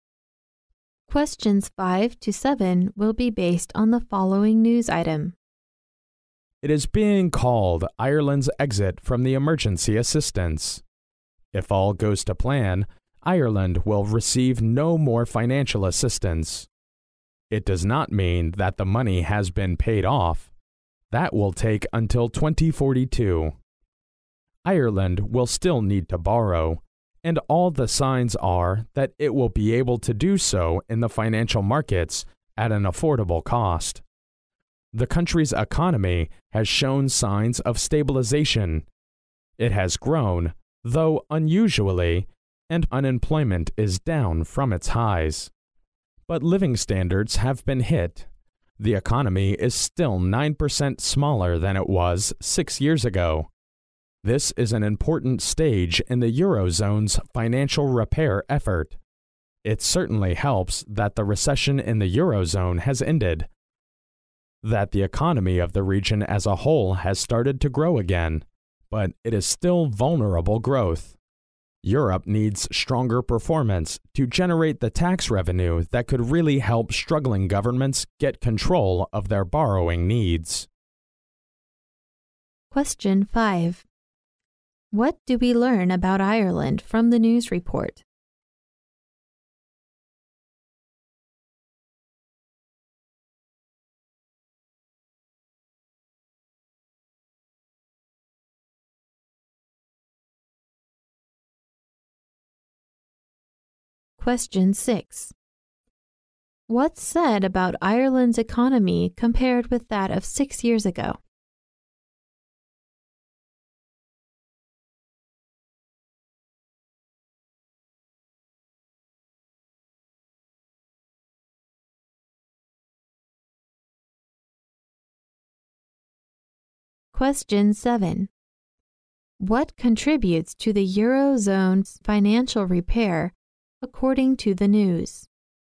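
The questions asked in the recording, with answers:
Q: What's said about Ireland's economy compared with that of 6 years ago?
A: It is still 9% smaller.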